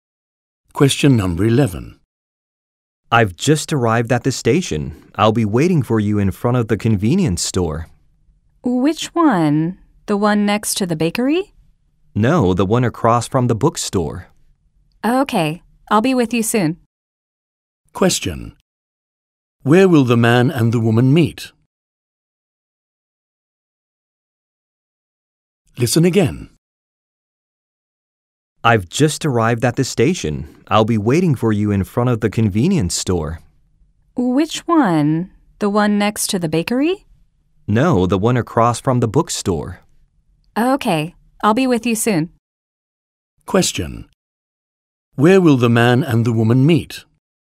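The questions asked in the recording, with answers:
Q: Question. Where will the man and the woman meet?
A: In front of the convenience store across from the bookstore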